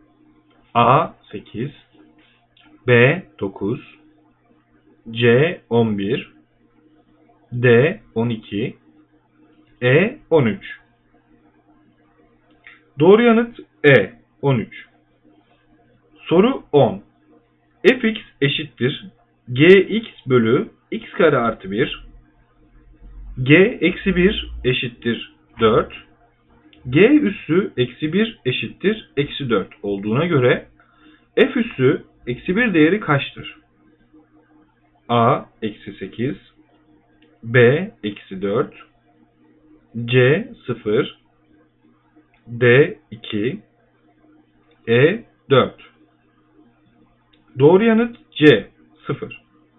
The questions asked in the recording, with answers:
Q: Soru 10 fx eşittir gx bölü x kare artı 1 g eksi 1 eşittir 4 g üssü eksi 1 eşittir eksi 4 olduğuna göre f üssü eksi 1 değeri kaçtır?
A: Doğru yanıt C 0.